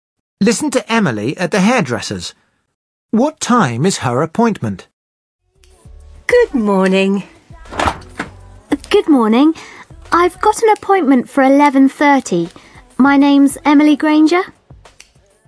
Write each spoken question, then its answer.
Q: What time is her appointment?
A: She says 11:30.